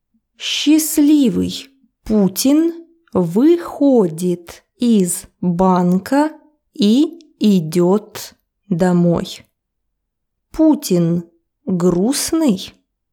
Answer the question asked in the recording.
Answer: Конечно, нет. Он счастливый.